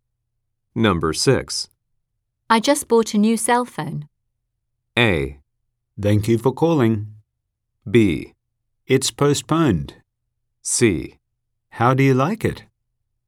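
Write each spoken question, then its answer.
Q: I just bought a new cell phone.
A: C: How do you like it?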